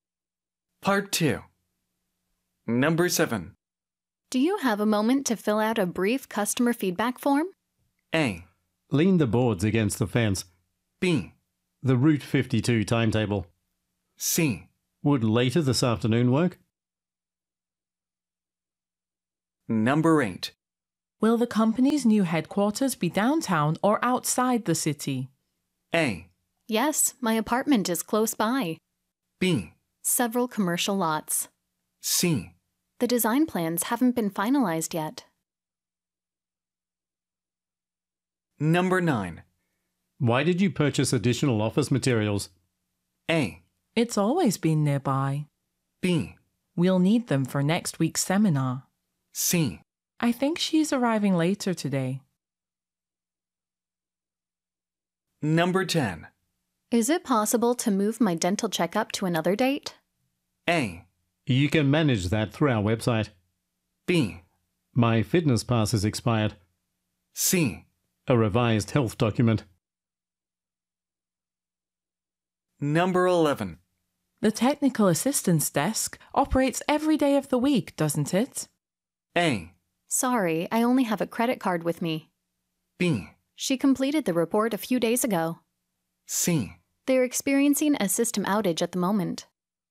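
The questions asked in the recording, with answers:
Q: Do you have a moment to fill out a brief customer feedback form?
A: C: Would later this afternoon work?

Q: Will the company's new headquarters be downtown or outside the city?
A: C: The design plans haven't been finalized yet.

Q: Why did you purchase additional office materials?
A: B: We'll need them for next week's seminar.

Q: Is it possible to move my dental checkup to another date?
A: A: You can manage that through our website.

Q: The technical assistance desk operates every day of the week, doesn't it?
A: C: They're experiencing a system outage at the moment.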